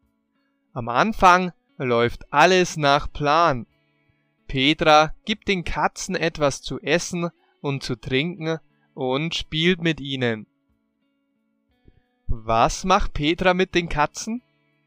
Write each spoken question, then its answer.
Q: Was macht Petra mit den Katzen?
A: Sie gibt den Katzen etwas zu essen und zu trinken und spielt mit ihnen.